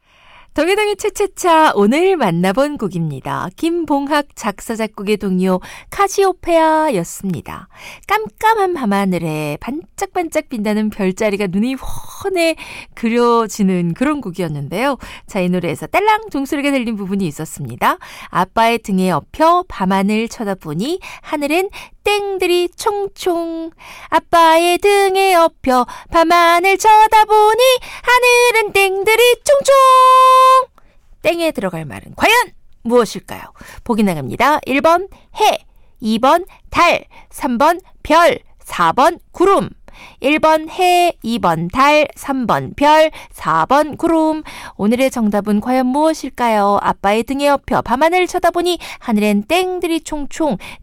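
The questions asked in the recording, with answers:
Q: 땡에 들어갈 말은 과연 무엇일까요?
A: 3번: 별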